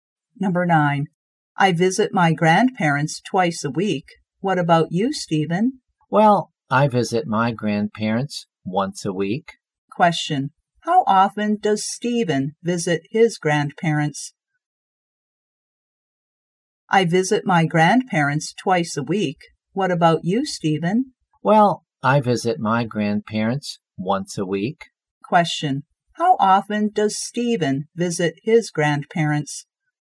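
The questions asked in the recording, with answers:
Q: How often does Stephen visit his grandparents?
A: Once a week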